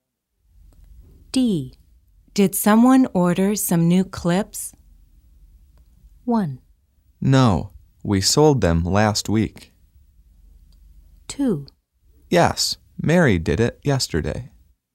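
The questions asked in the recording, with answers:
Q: Did someone order some new clips?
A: 2: Yes, Mary did it yesterday.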